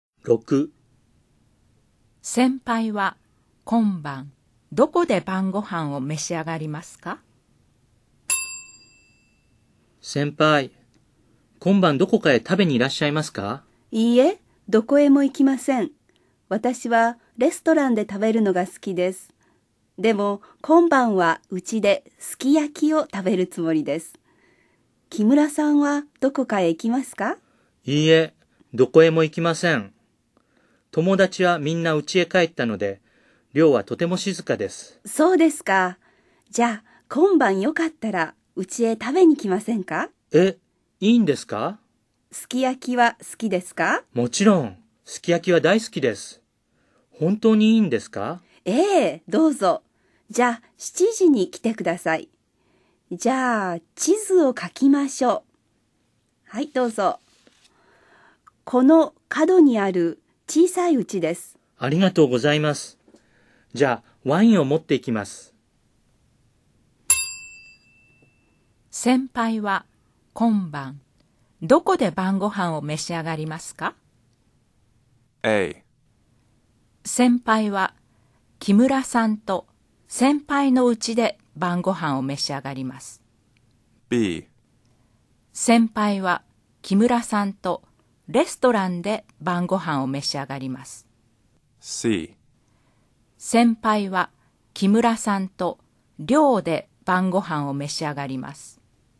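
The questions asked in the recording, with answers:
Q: 先輩は今晩どこで晩ご飯を召し上がりますか?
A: A: 先輩は木村さんと先輩の家で晩ご飯を召し上がります。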